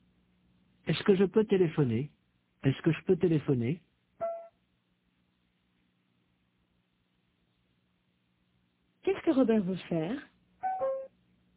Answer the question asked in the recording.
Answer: Il veut téléphoner.